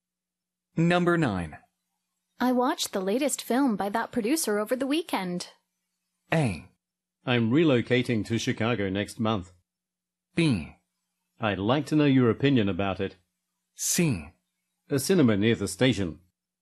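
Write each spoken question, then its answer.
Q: I watched the latest film by that producer over the weekend.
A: B: I'd like to know your opinion about it.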